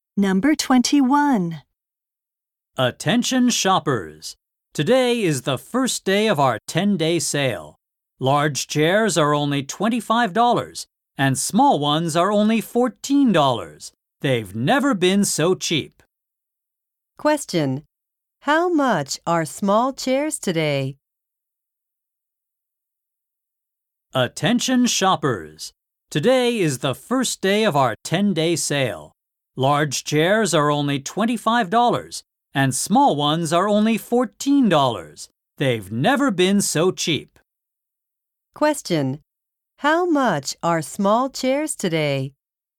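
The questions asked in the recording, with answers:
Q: How much are small chairs today?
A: $14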